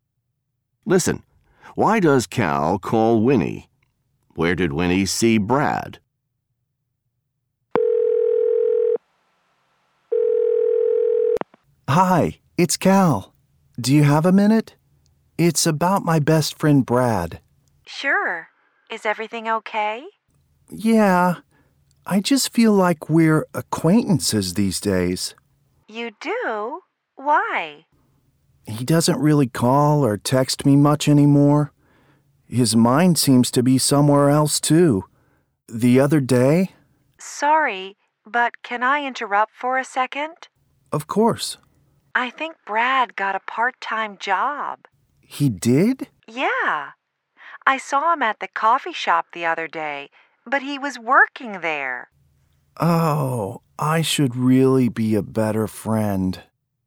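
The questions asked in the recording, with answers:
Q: Why does Cal call Winnie?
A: To talk about his best friend Brad, who doesn't call or text him much anymore

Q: Where did Winnie see Brad?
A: At the coffee shop, working there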